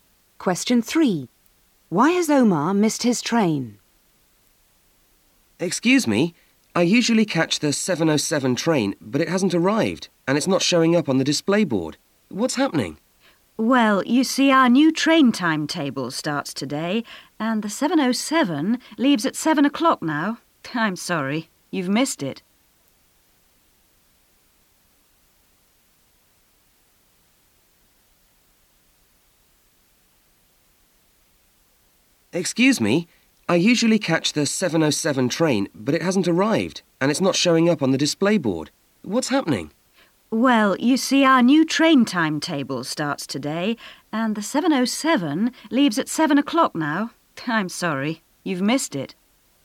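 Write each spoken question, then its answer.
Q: Why has Omar missed his train?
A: A new timetable started today; the train now leaves at 7 o'clock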